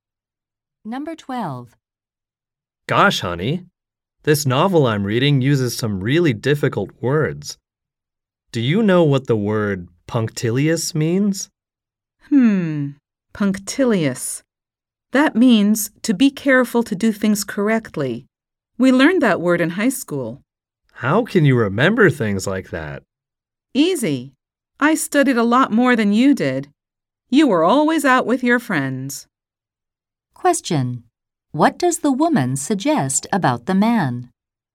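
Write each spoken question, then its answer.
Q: What does the woman suggest about the man?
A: He didn't study much in high school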